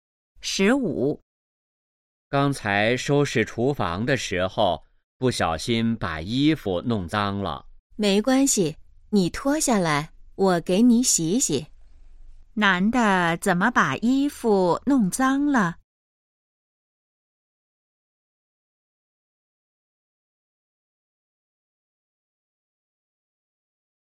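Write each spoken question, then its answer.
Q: 男的怎么把衣服弄脏了?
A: 收拾厨房时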